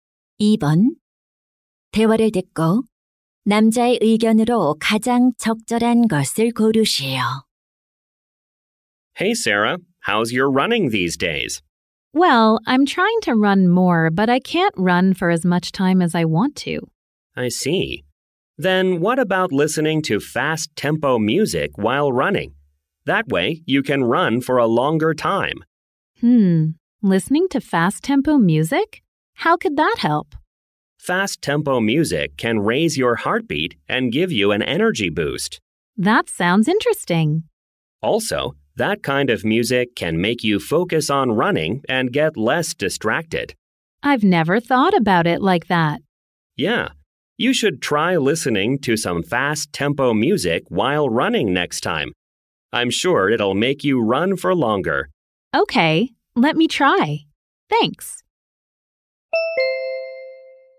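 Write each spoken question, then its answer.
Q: 대화를 듣고 남자의 의견으로 가장 적절한 것을 고르시오.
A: 달리기를 할 때 빠른 템포의 음악을 들으면 더 오래 달릴 수 있다.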